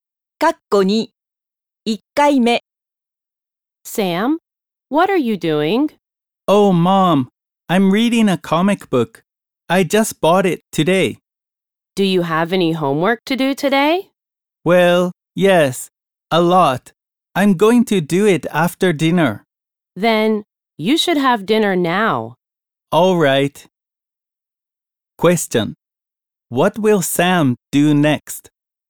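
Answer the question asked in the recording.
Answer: He will have dinner.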